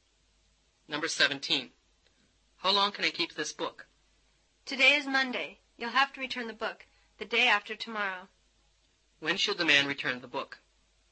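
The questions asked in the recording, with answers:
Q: When should the man return the book?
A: Wednesday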